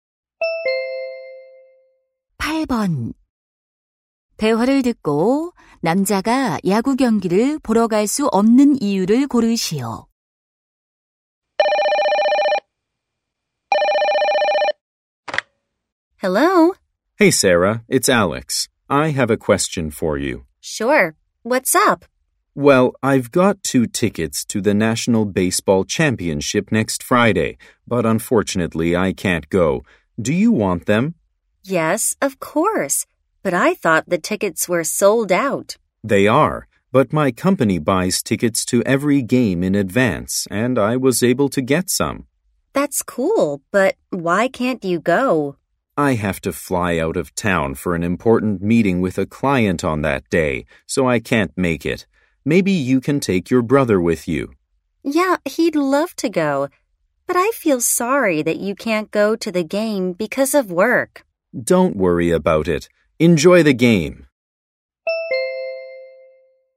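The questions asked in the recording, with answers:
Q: 대화를 듣고 남자가 야구 경기를 보러 갈 수 없는 이유를 고르시오.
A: 고객과의 중요한 회의로 출장을 가야 해서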